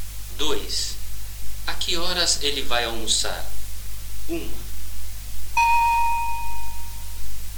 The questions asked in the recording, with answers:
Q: A que horas ele vai almoçar?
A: Ele vai almoçar a 1.